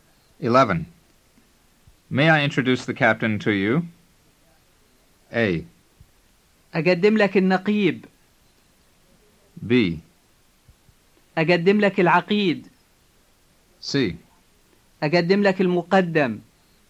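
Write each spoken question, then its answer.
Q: May I introduce the captain to you?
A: A: أقدم لك النقيب.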